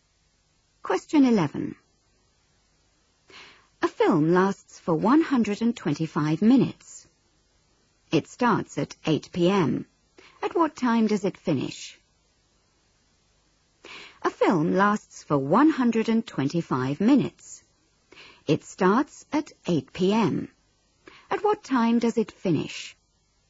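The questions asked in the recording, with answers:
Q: At what time does it finish?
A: 10:05 p.m.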